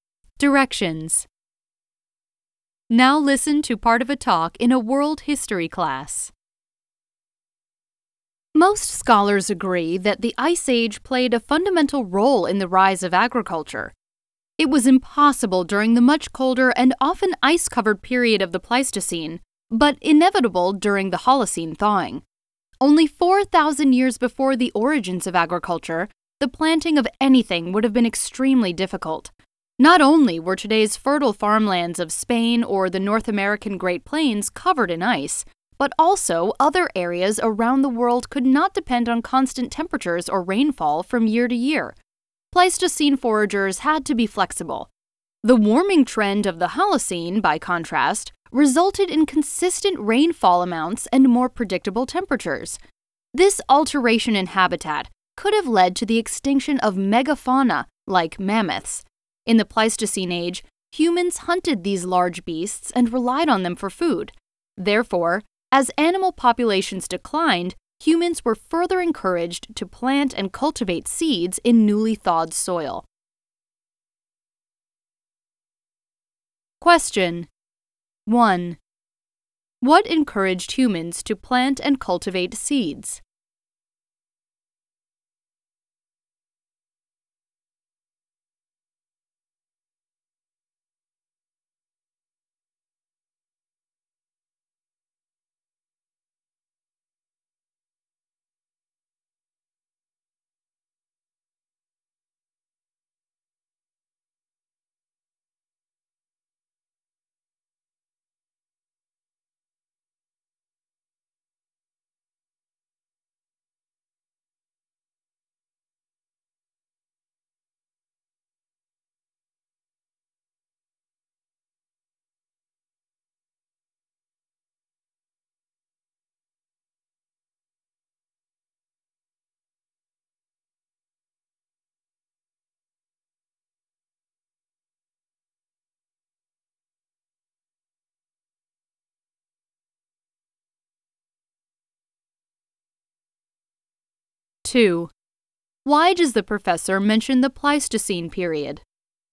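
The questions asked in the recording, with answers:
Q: What encouraged humans to plant and cultivate seeds?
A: The decline of large animal populations (megafauna) they had hunted for food, as the climate warmed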